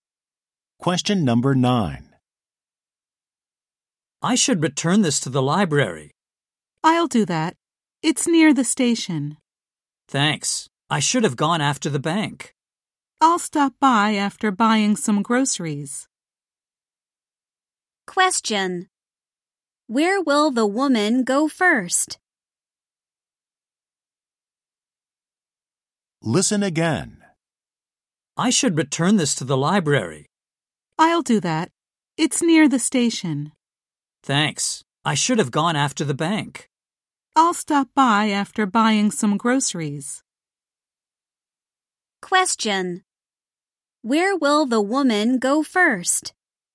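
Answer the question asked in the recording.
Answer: The grocery store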